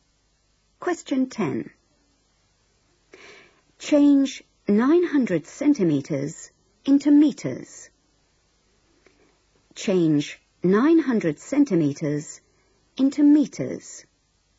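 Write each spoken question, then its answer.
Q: Change 900 centimeters into meters.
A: 9 meters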